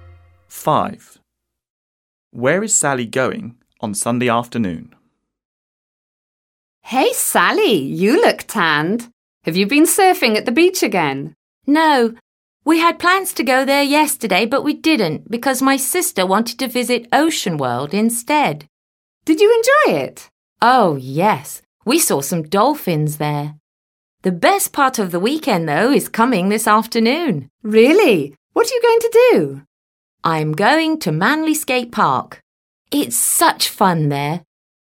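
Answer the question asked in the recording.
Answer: Manly Skate Park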